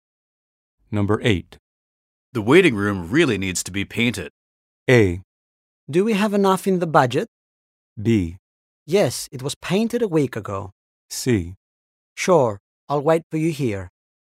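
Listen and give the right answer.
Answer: A: Do we have enough in the budget?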